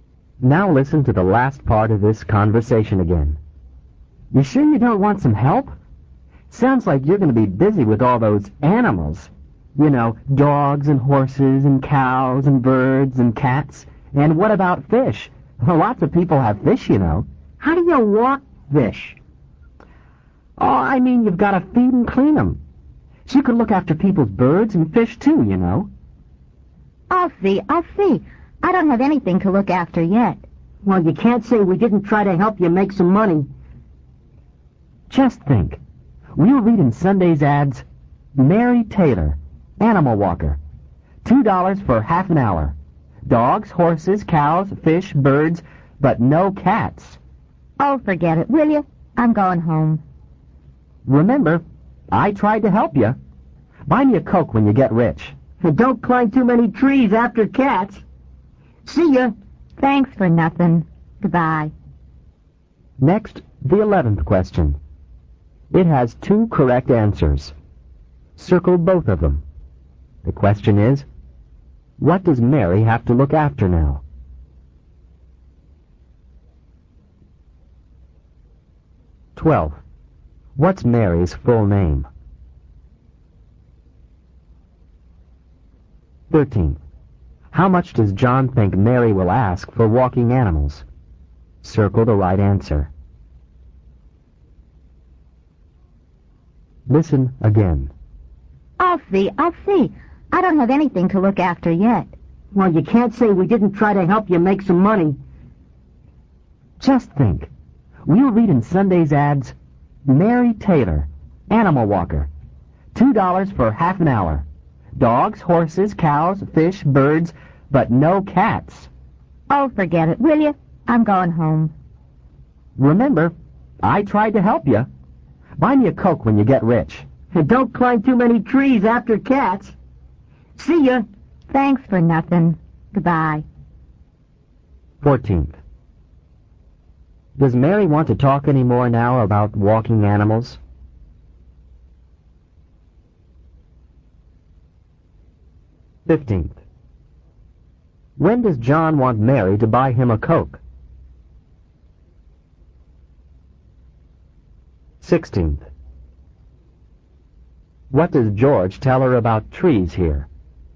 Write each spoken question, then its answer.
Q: What's Mary's full name?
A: 12th, Mary, capital M-A-R-Y, Taylor, capital T-A-Y-L-O-R.

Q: How much does John think Mary will ask for walking animals?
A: 13th, you should have circled answer C, $2 for half an hour.

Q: Does Mary want to talk any more now about walking animals?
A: No, she doesn't.

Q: When does John want Mary to buy him a Coke?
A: 15th, when she gets, G-E-T-S, rich, R-I-C-H.

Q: What does George tell her about trees here?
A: Don't climb, C-L-I-M-B, 2, T-O-O, many, M-A-N-Y, trees after, A-F-T-E-R, cats, C-A-T-S.